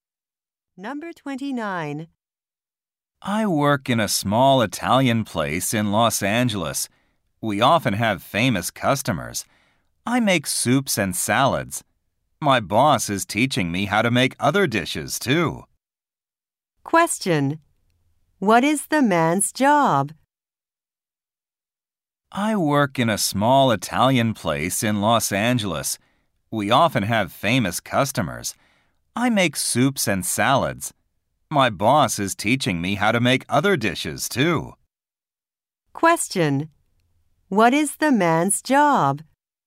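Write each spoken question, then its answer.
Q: What is the man's job?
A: He is a cook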